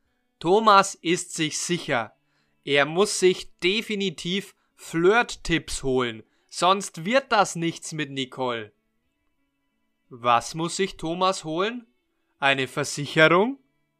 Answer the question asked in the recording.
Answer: Nein, Thomas muss sich keine Versicherung holen, sondern Flirt-Tipps.